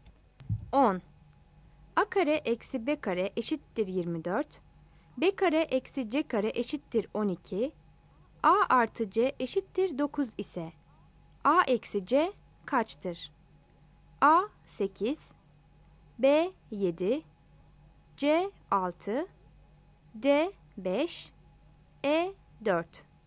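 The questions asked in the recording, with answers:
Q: A kare eksi B kare eşittir 24, B kare eksi C kare eşittir 12, A artı C eşittir 9 ise A eksi C kaçtır?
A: E: 4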